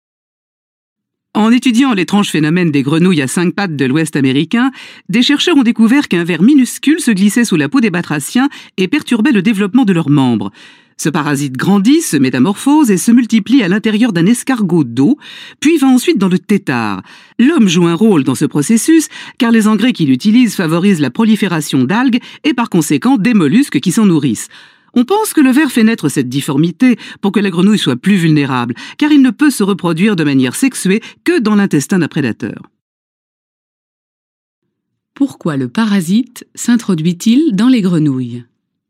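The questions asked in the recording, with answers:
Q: Pourquoi le parasite s'introduit-il dans les grenouilles ?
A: Pour les rendre plus vulnérables aux prédateurs, car il ne peut se reproduire de manière sexuée que dans l'intestin d'un prédateur.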